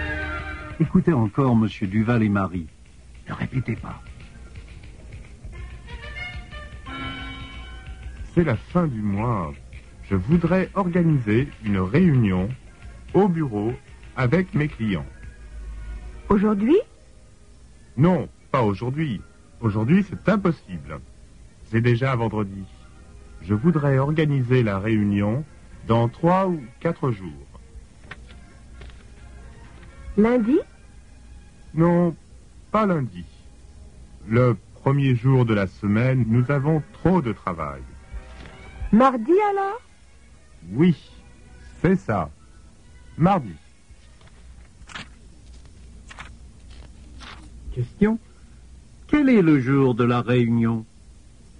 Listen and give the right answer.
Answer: Le jour de la réunion est mardi.